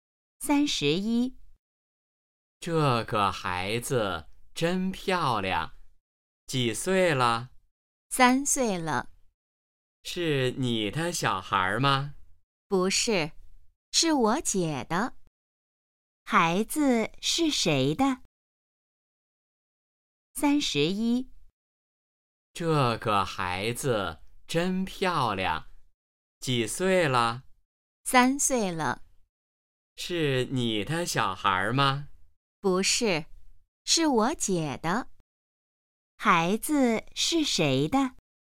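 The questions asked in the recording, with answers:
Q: 孩子是谁的?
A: 她姐姐的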